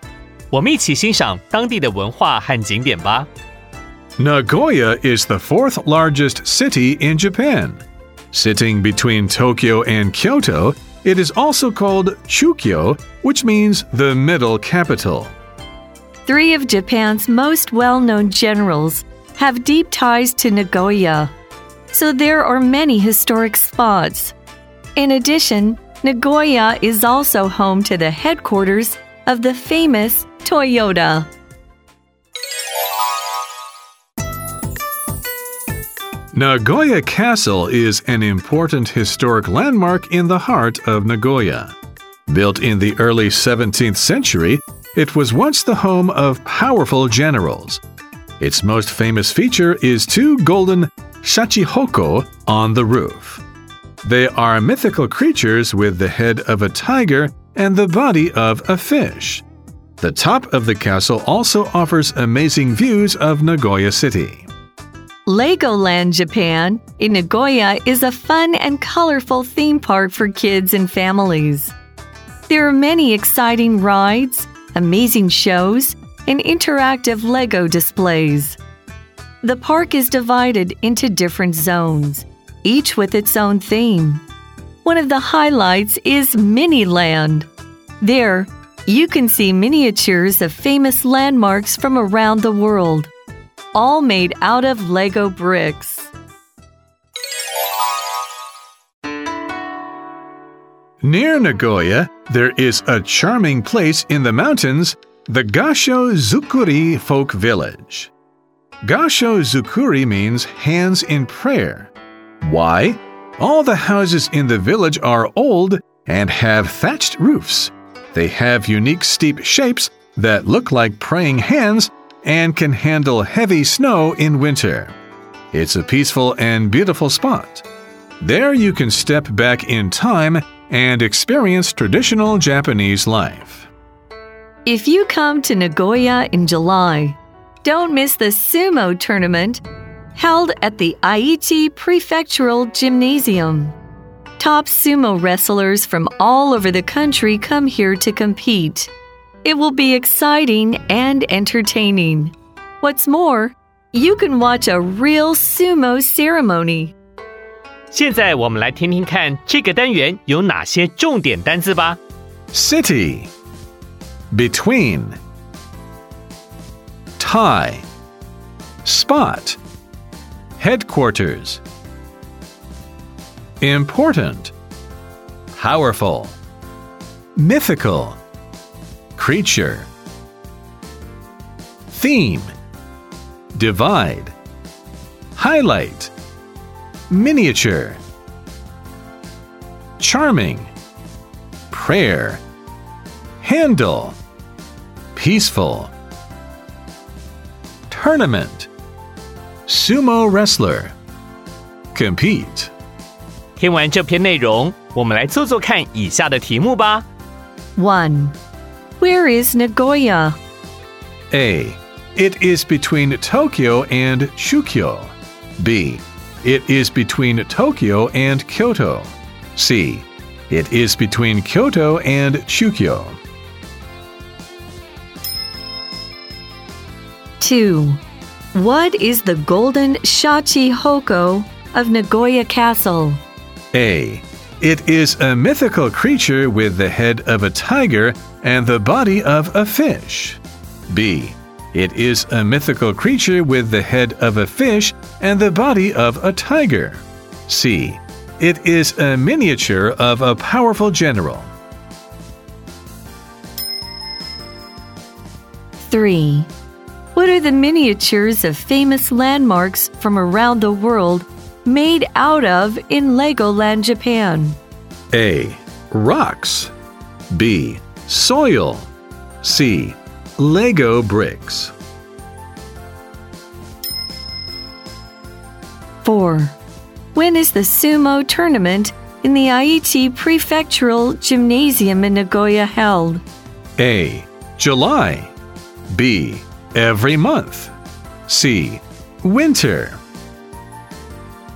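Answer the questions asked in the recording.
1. B: It is between Tokyo and Kyoto.
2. A: It is a mythical creature with the head of a tiger and the body of a fish.
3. C: Lego bricks.
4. A: July.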